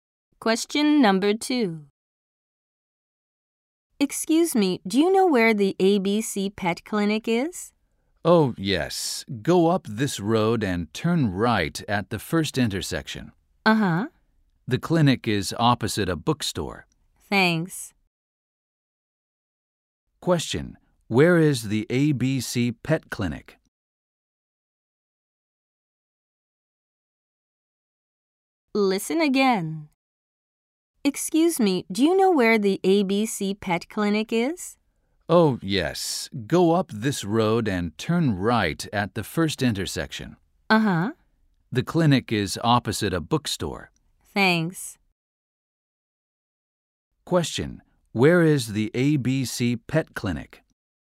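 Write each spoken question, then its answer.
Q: Question, where is the ABC Pet Clinic?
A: Up the road, turn right at the first intersection, opposite a bookstore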